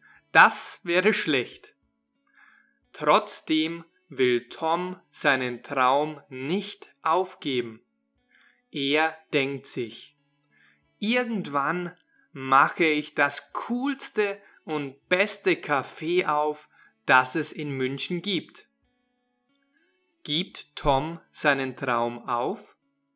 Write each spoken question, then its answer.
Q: Gibt Tom seinen Traum auf?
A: Nein, er will seinen Traum nicht aufgeben.